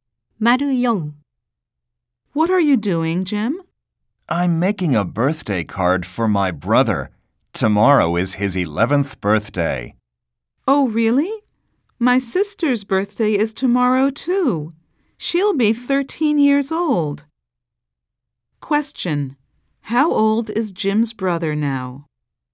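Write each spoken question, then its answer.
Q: How old is Jim's brother now?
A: 10 years old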